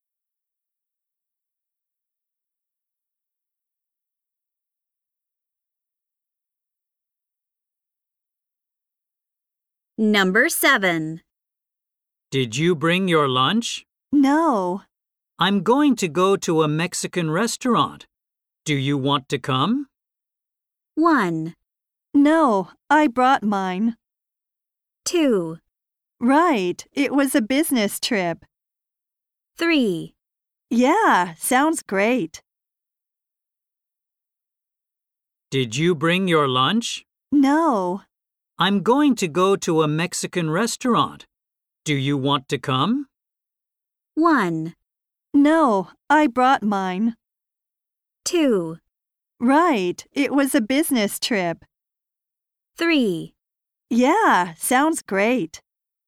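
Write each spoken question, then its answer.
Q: Do you want to come?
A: 3: Yeah, sounds great.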